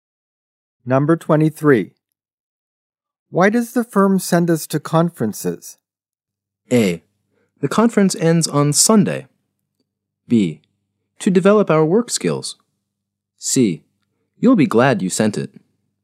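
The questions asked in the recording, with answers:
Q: Why does the firm send us to conferences?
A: B: To develop our work skills.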